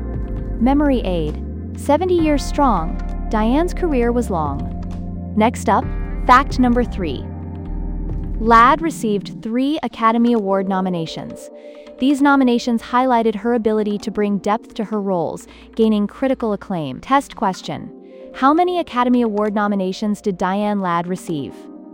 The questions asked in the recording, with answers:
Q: How many Academy Award nominations did Diane Ladd receive?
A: Correct answer, 3.